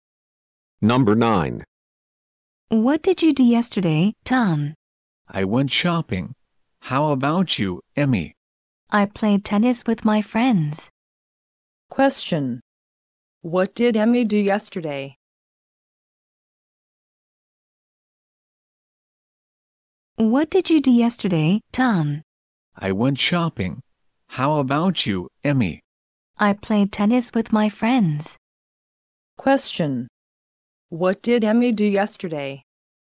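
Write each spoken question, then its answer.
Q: What did Emmy do yesterday?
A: She played tennis with her friends.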